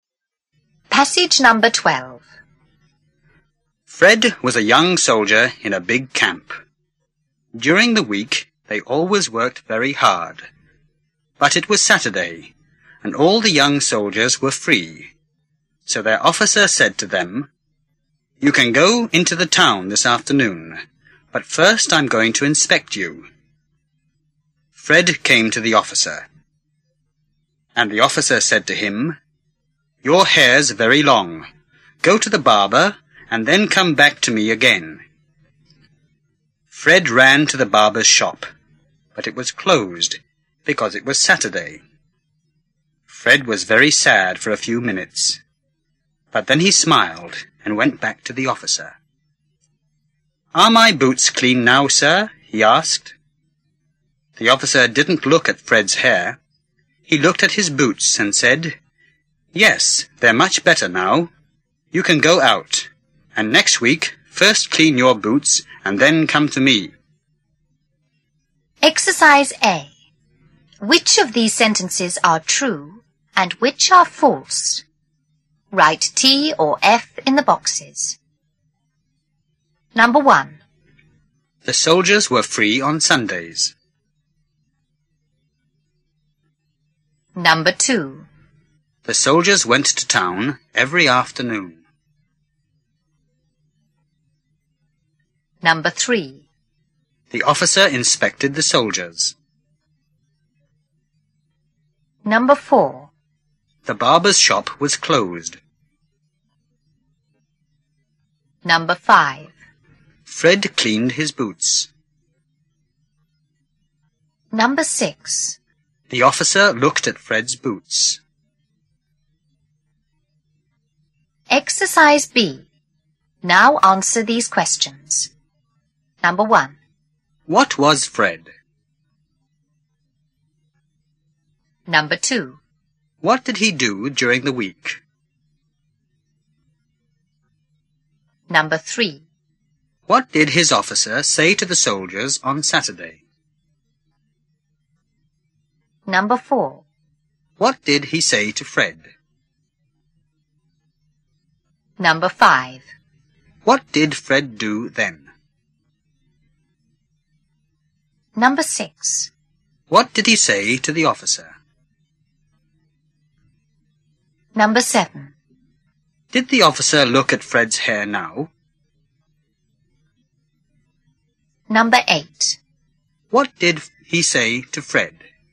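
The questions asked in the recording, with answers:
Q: What was Fred?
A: A young soldier in a big camp

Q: What did he do during the week?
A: He worked very hard

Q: What did his officer say to the soldiers on Saturday?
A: They could go into the town that afternoon, but first he was going to inspect them

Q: What did he say to Fred?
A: His hair was very long; go to the barber and come back

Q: What did Fred do then?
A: He ran to the barber's shop, but it was closed

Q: What did he say to the officer?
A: "Are my boots clean now, sir?"

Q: Did the officer look at Fred's hair now?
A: No, he didn't

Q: What did he say to Fred?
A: His boots were much better; he could go out, and next week clean his boots first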